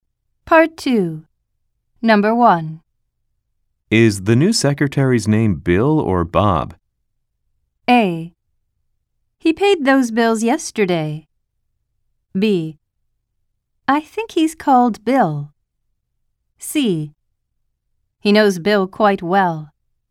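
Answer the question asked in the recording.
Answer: B: I think he's called Bill.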